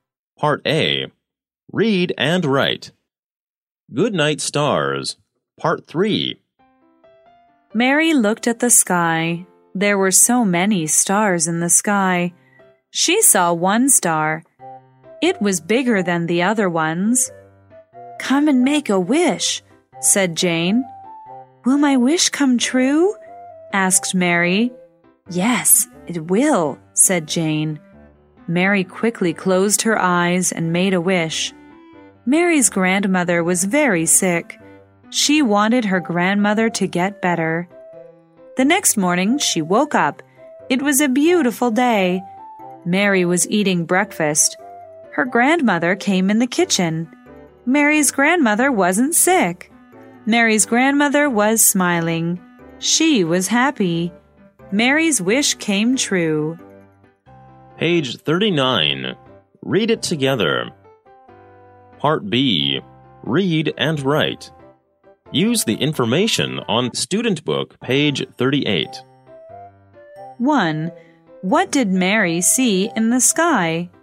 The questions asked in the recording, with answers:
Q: What did Mary see in the sky?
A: She saw many stars in the sky.